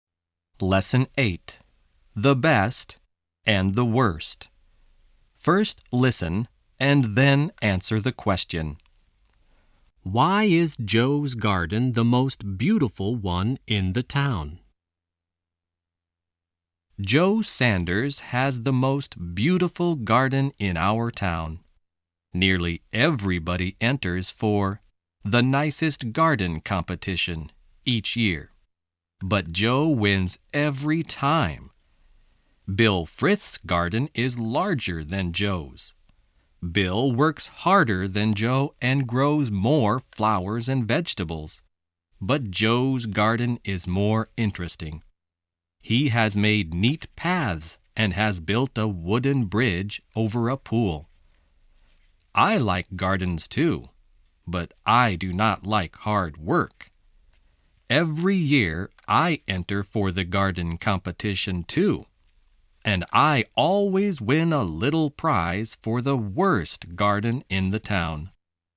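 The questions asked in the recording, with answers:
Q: Why is Joe's garden the most beautiful one in the town?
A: Because it is more interesting: he has made neat paths and built a wooden bridge over a pool.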